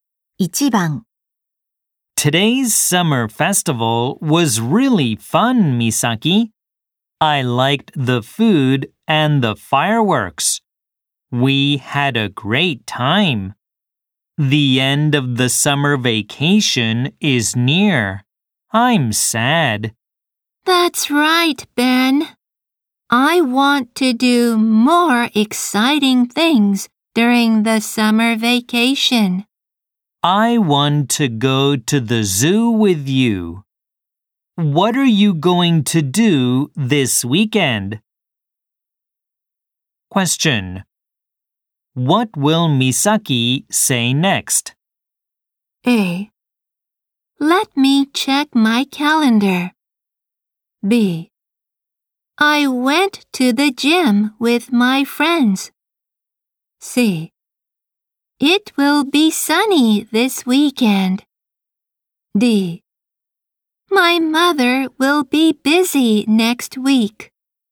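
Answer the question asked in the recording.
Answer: A: Let me check my calendar.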